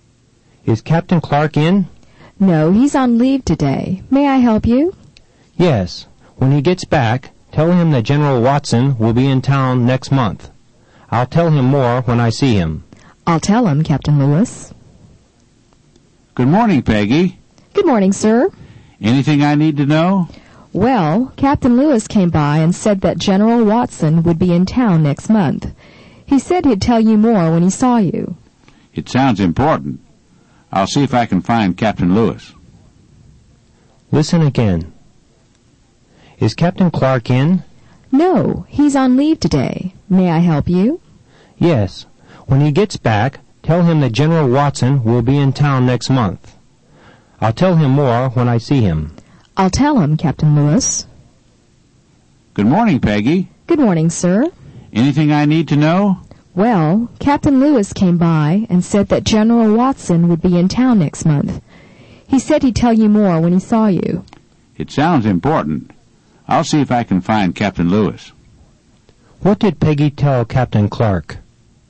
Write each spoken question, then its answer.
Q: What did Peggy tell Captain Clark?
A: She told him that Captain Lewis came by and said that General Watson would be in town next month.